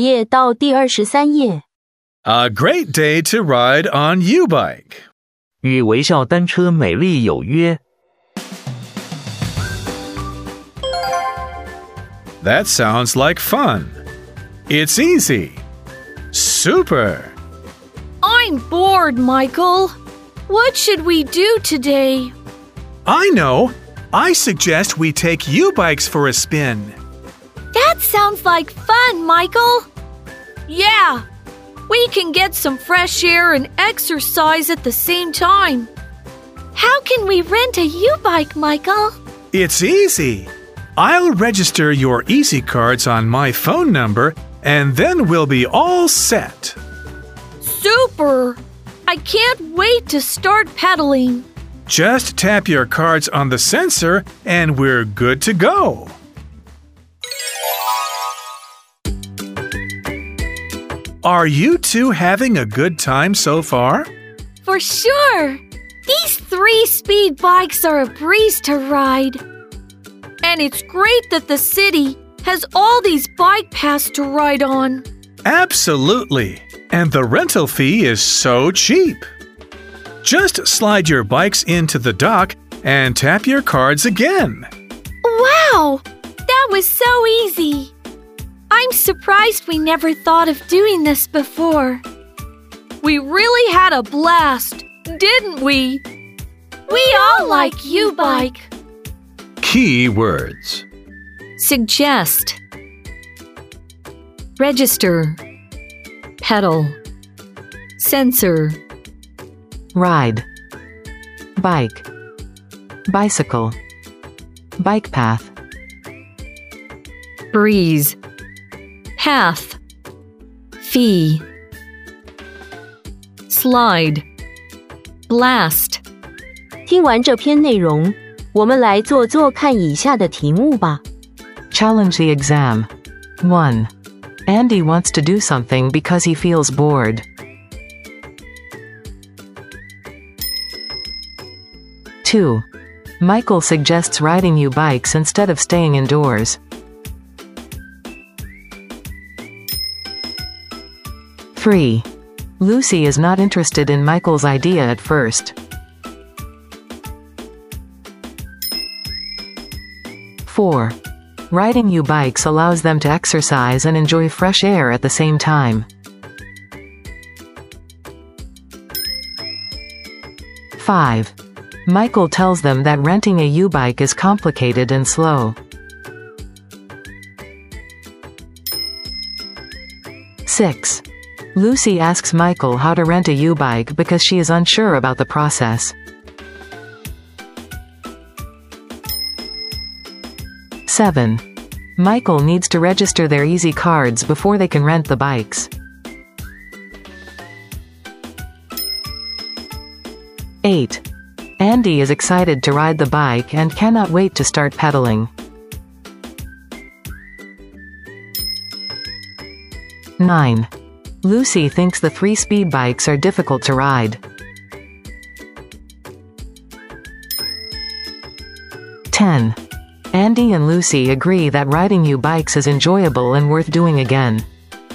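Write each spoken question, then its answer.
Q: Michael suggests riding U-bikes instead of staying indoors.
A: True

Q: Riding U-bikes allows them to exercise and enjoy fresh air at the same time.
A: True

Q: Michael tells them that renting a U-bike is complicated and slow.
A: False

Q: Michael needs to register their easy cards before they can rent the bikes.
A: True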